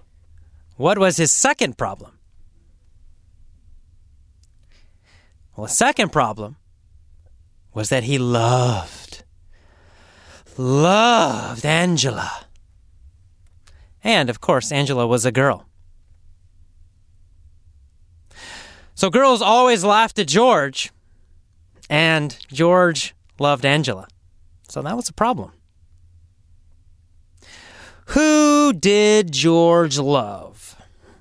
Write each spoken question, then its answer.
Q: Who did George love?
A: Angela. He loved Angela.